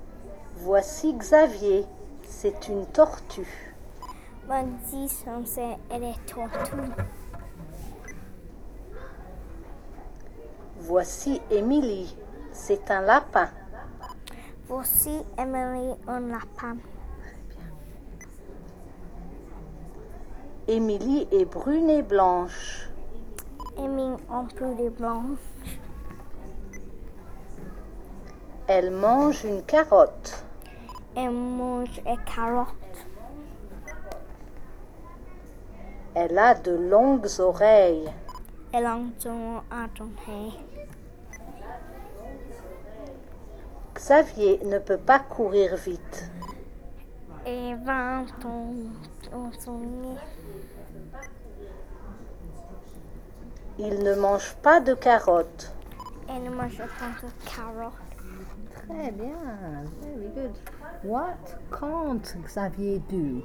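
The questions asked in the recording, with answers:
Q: What can't Xavier do?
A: Run fast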